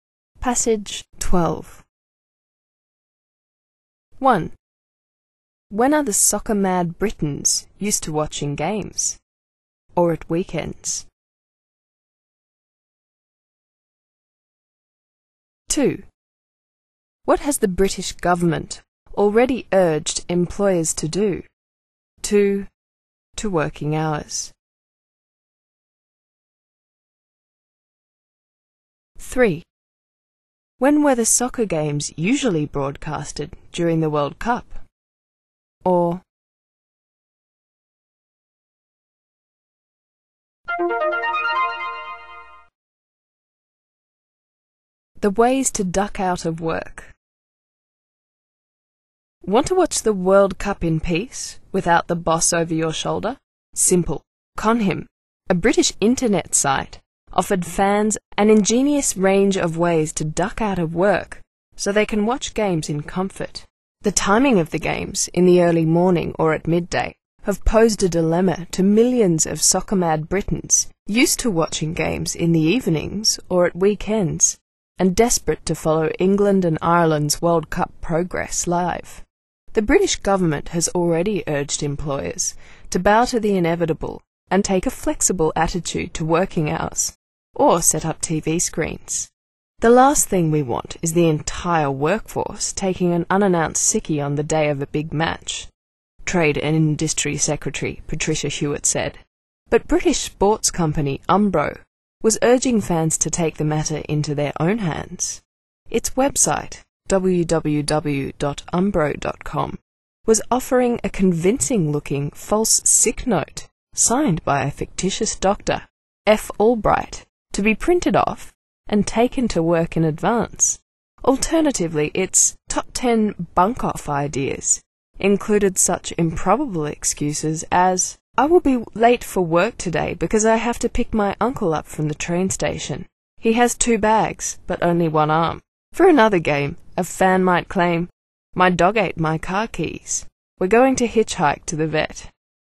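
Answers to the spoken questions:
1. In the evenings or at weekends
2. To take a flexible attitude to working hours, or set up TV screens
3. In the early morning or at midday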